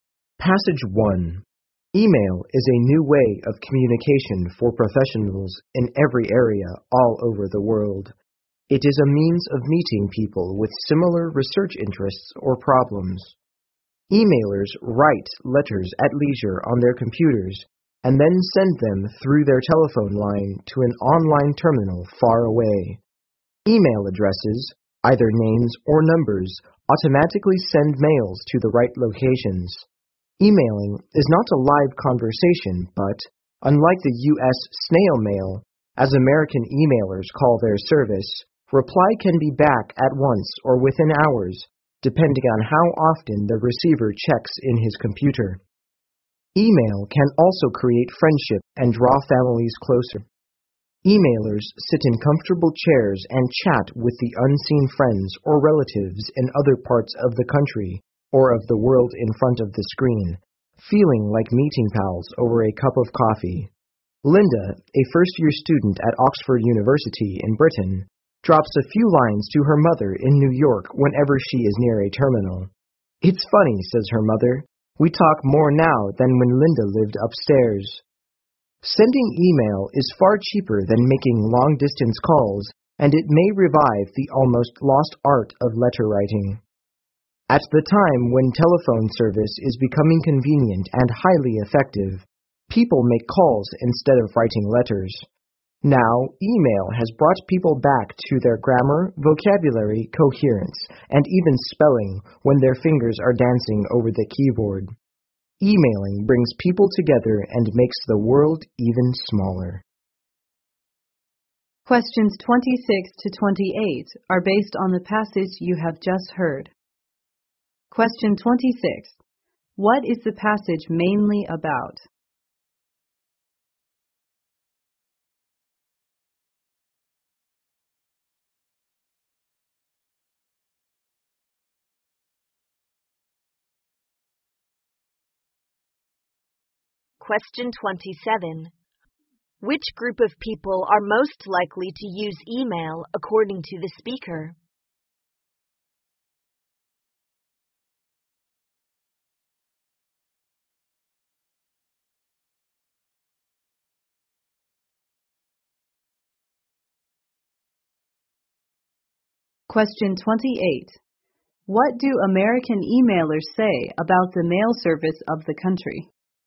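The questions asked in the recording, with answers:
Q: What is the passage mainly about?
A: Email as a new means of communication

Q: Which group of people are most likely to use email according to the speaker?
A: Professionals in every area

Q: What do American emailers say about the mail service of the country?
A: They call it snail mail (slow)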